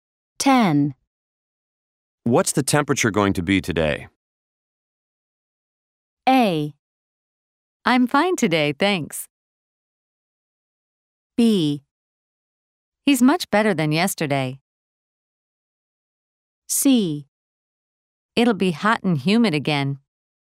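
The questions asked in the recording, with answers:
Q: What's the temperature going to be today?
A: C: It'll be hot and humid again.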